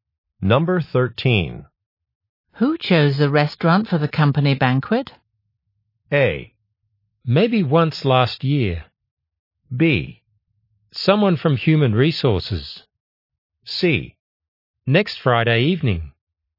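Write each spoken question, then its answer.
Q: Who chose the restaurant for the company banquet?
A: B: Someone from Human Resources.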